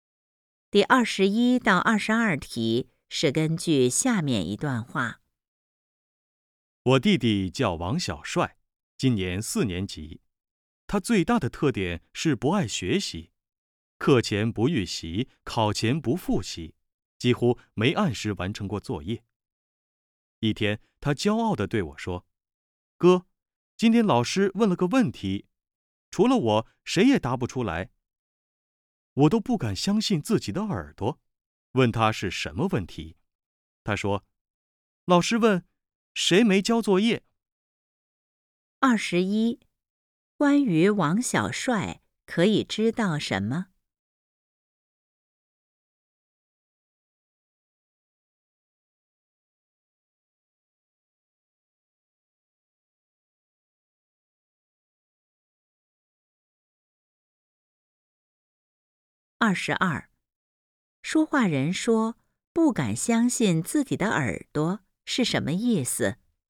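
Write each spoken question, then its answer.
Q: 关于王小帅可以知道什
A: 他不爱学习,没交作业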